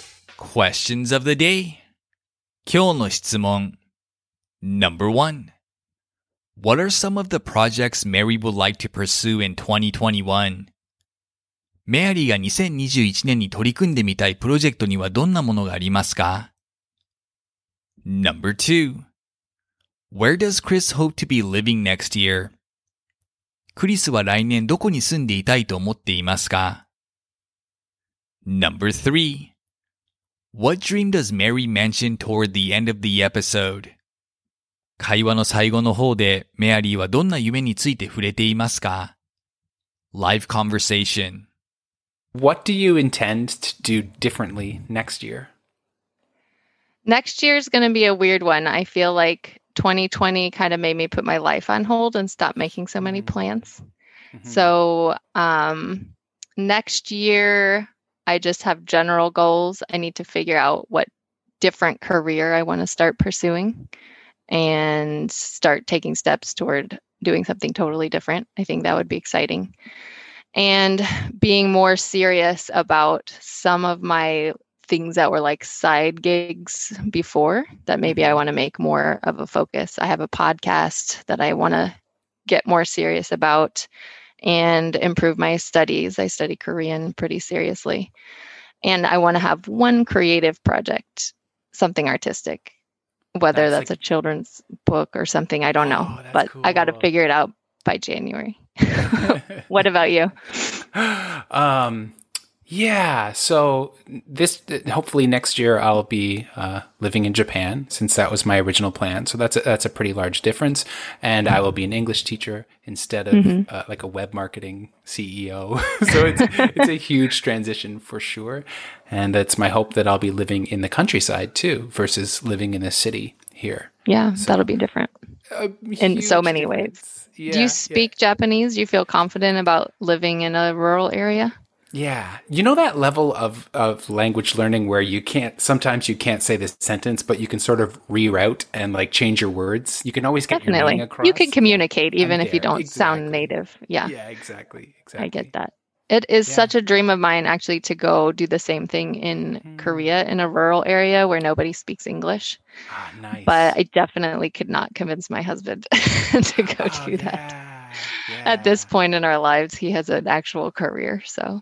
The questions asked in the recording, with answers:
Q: What are some of the projects Mary would like to pursue in 2021?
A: She wants to begin pursuing a new career, along with improving her Korean studies,focusing more on her podcast, and working on an artistic project like a children's book.

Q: Where does Chris hope to be living next year?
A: He hopes to be living in Japan as an English teacher, preferably in the Japanese countryside.

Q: What dream does Mary mention toward the end of the episode?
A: Mary says she has a dream of teaching English,like Chris in a rural area of a foreign country.